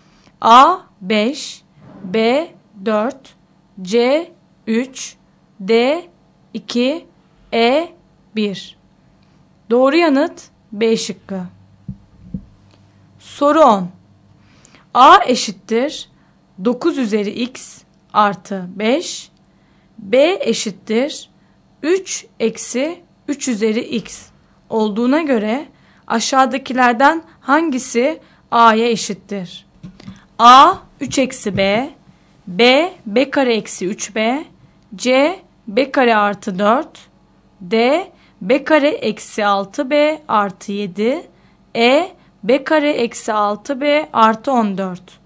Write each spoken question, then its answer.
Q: B eşittir 3 eksi 3 üzeri x olduğuna göre aşağıdakilerden hangisi A'ya eşittir?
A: Doğru yanıt E şıkkı.